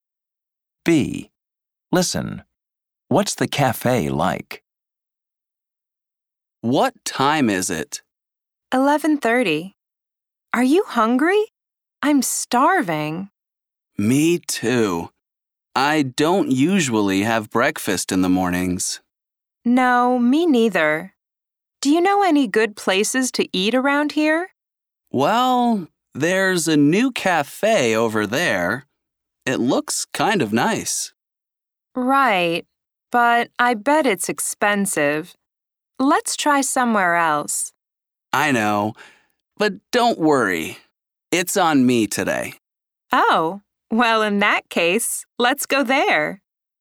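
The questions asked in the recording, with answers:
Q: What's the cafe like?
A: It's new and looks kind of nice, but it's probably expensive.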